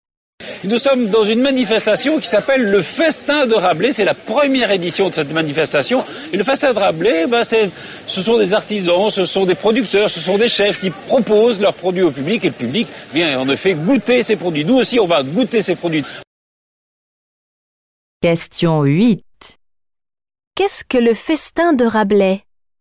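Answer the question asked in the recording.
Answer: Une manifestation où artisans, producteurs et chefs font goûter leurs produits au public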